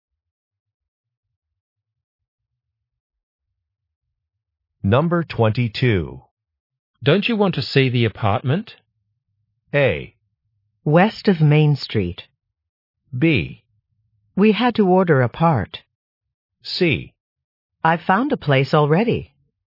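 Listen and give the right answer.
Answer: C: I've found a place already.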